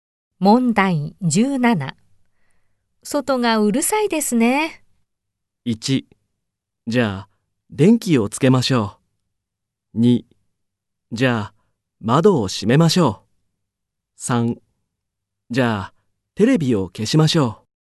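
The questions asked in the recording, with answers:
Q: 外がうるさいですね。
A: 3: じゃあ、窓を閉めましょう。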